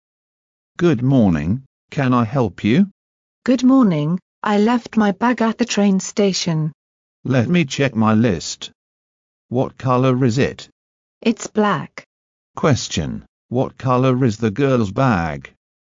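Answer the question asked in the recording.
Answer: Black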